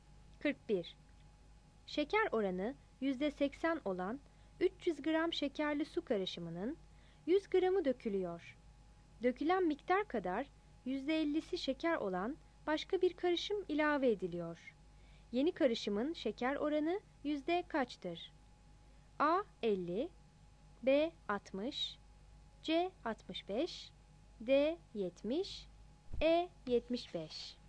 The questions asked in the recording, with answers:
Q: Yeni karışımın şeker oranı yüzde kaçtır?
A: 41 D